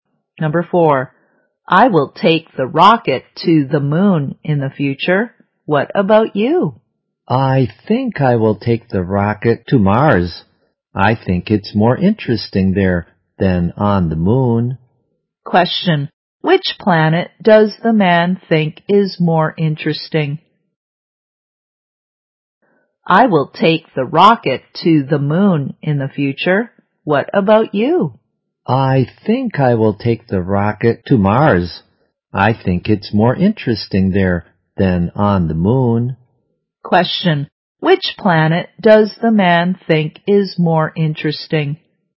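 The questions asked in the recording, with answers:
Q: which planet does the man think is more interesting?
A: Mars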